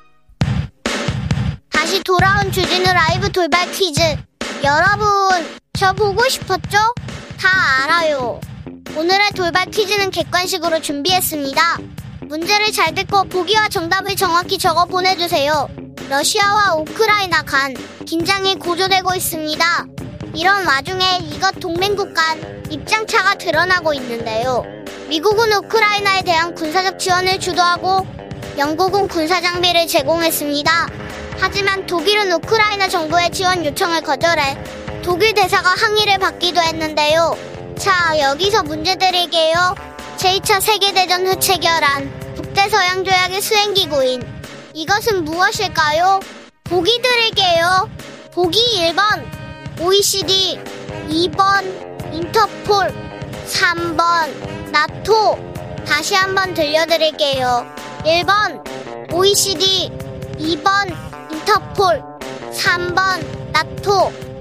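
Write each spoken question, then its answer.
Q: 제2차 세계대전 후 체결한 북대서양 조약의 수행기구인 이것은 무엇일까요?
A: 3: 나토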